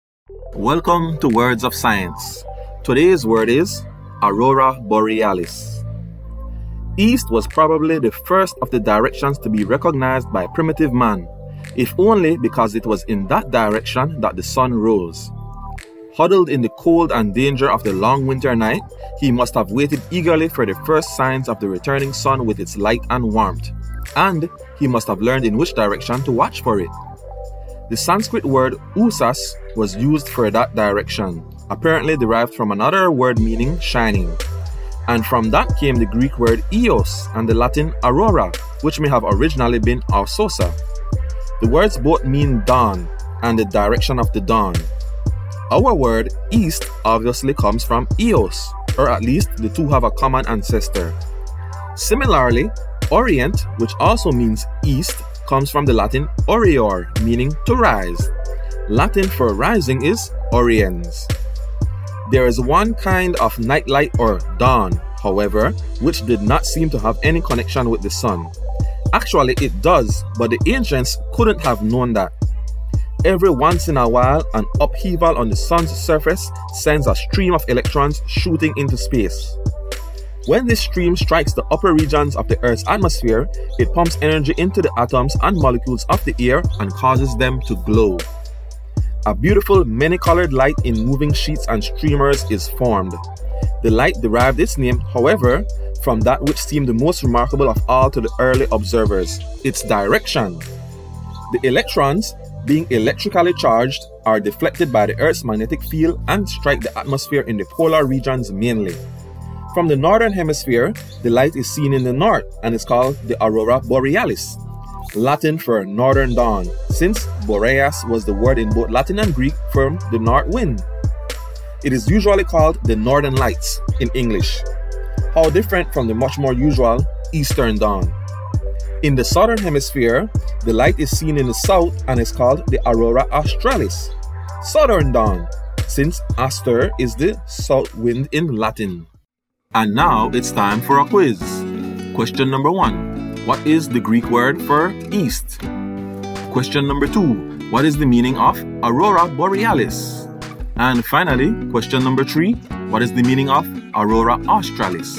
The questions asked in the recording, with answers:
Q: What is the Greek word for east?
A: east

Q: What is the meaning of Aurora Borealis?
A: northern dawn

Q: What is the meaning of Aurora Australis?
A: southern dawn